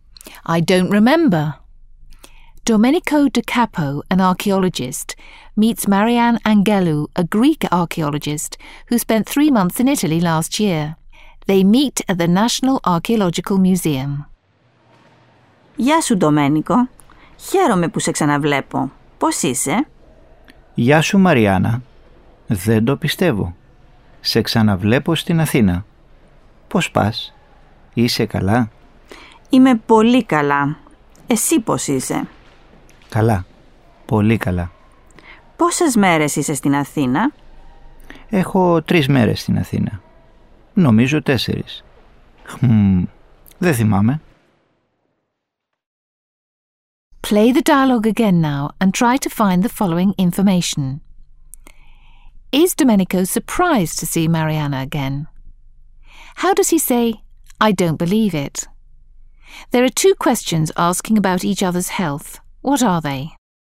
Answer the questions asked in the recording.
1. Domenico is really surprised to see Marianna again.
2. Δεν το πιστεύω.
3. Πώς είσαι?